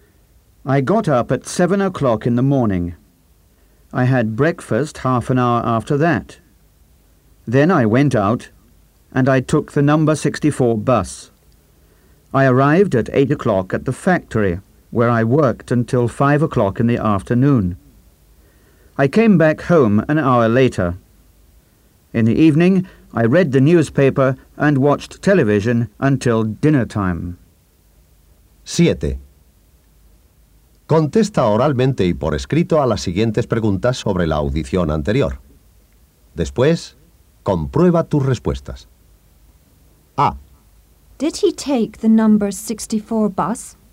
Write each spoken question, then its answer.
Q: Did he take the number 64 bus?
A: Yes, he did.